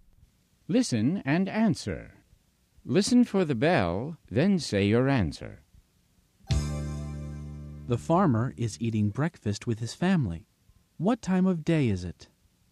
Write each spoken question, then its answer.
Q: What time of day is it?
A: It's morning.